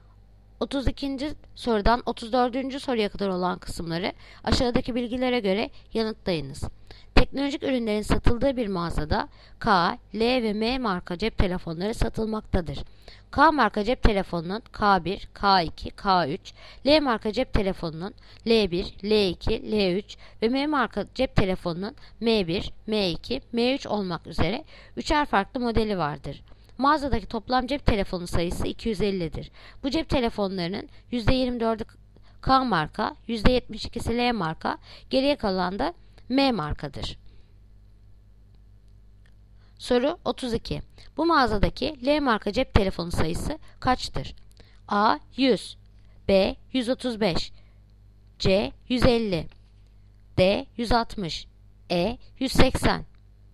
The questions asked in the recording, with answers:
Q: Bu mağazadaki L marka cep telefonu sayısı kaçtır?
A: Yanıt Edirne 180.